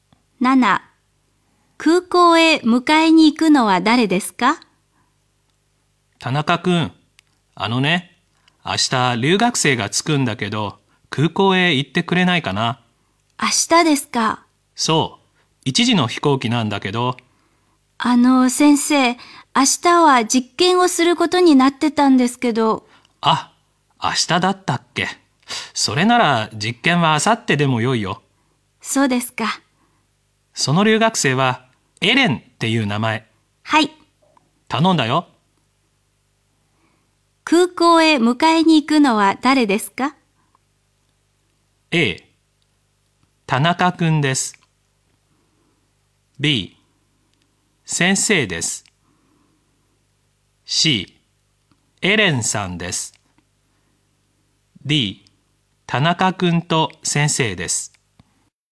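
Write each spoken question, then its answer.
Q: 空港へ迎えに行くのは誰ですか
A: A: 田中くんです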